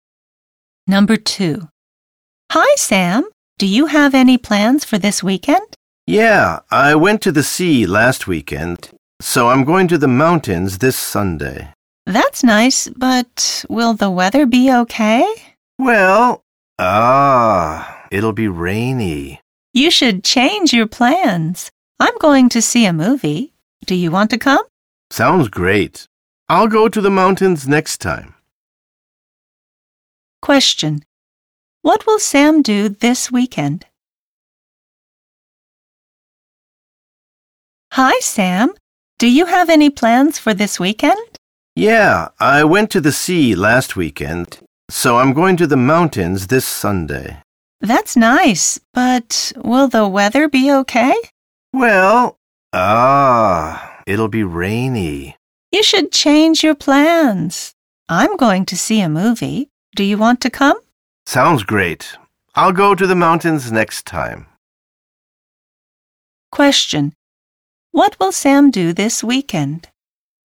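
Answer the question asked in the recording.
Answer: He will see a movie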